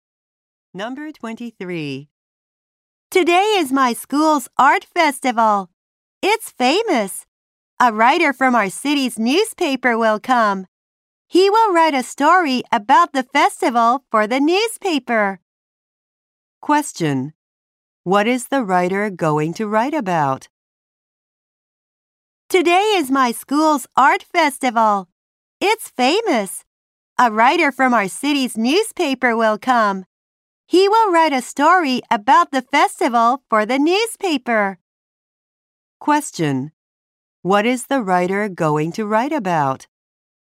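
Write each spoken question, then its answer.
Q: What is the writer going to write about?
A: The school's art festival.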